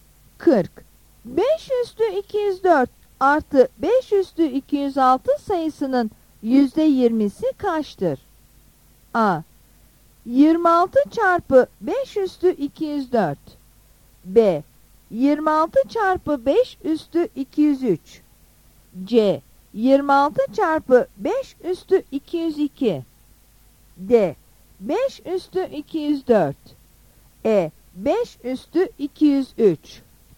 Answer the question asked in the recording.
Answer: Yanıt B'dir.